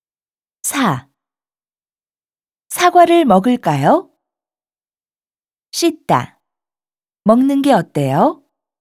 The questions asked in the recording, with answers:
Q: 사과를 먹을까요?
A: 씻어서 먹는 게 어때요?